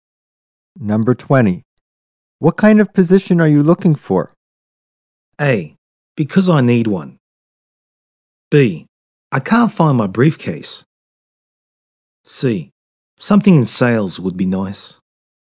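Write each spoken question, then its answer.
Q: What kind of position are you looking for?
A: C: Something in sales would be nice.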